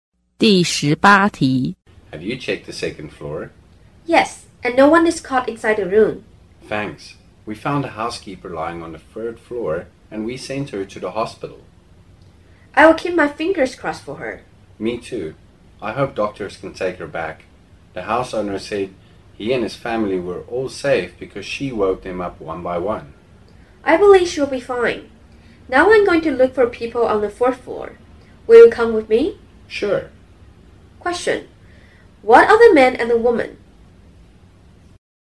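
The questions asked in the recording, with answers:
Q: What are the man and the woman?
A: Firefighters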